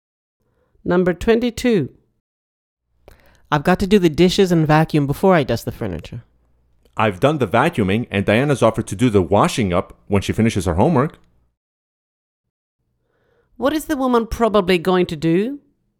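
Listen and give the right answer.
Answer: dust the furniture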